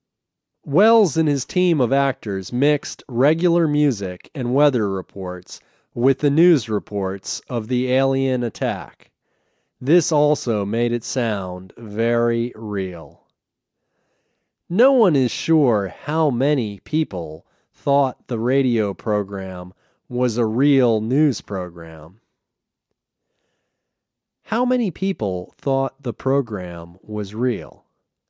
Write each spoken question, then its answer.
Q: How many people thought the program was real?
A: No one is sure how many people thought the program was real.